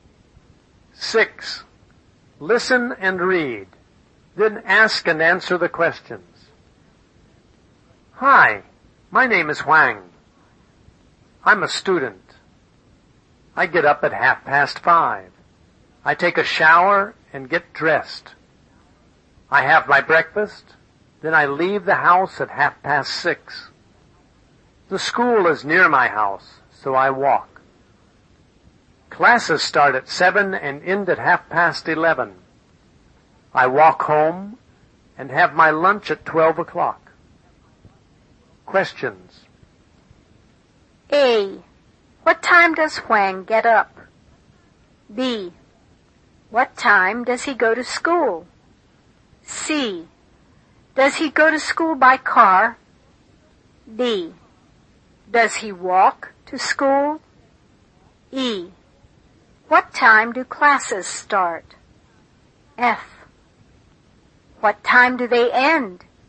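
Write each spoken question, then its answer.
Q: What time does Huang get up?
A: At 5:30

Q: What time does he go to school?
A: At 6:30

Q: Does he go to school by car?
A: No, he walks

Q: Does he walk to school?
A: Yes

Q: What time do classes start?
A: At 7

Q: What time do they end?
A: At 11:30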